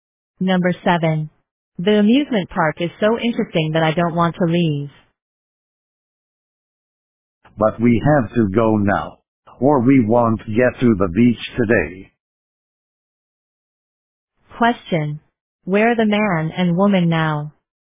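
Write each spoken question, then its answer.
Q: Where are the man and woman now?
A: At the amusement park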